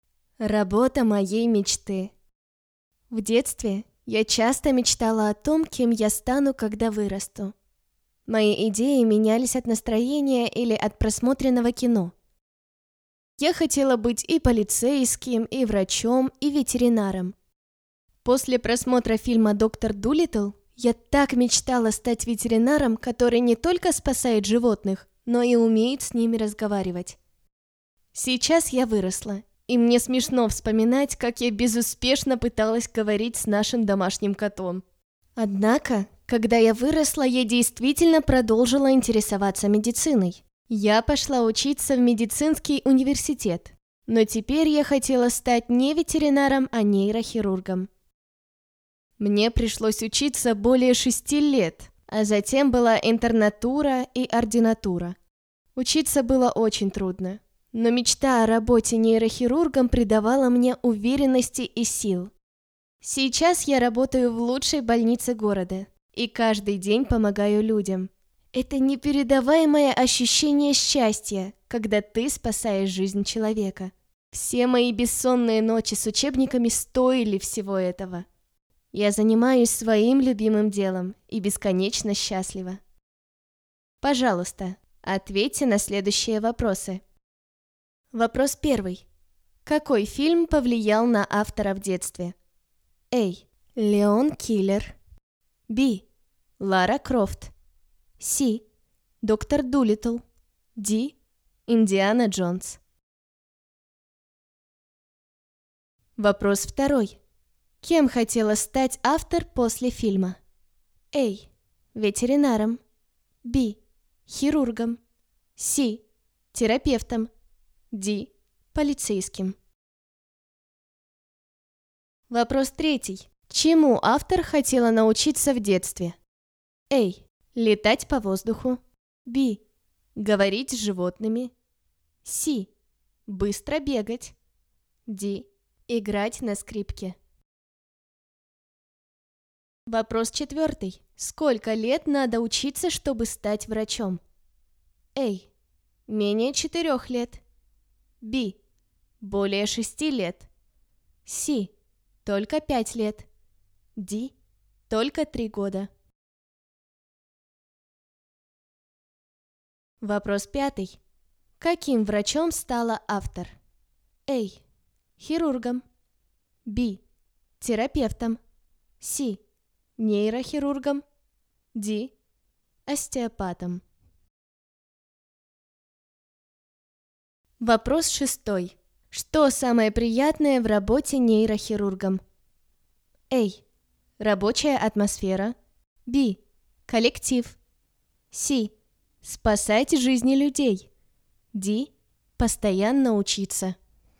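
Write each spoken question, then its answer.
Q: Какой фильм повлиял на автора в детстве?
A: C: Доктор Дулиттл

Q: Кем хотела стать автор после фильма?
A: A: Ветеринаром

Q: Чему автор хотела научиться в детстве?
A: B: Говорить с животными

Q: Сколько лет надо учиться, чтобы стать врачом?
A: B: Более 6 лет

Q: Каким врачом стала автор?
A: C: Нейрохирургом

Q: Что самое приятное в работе нейрохирургом?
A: C: Спасать жизни людей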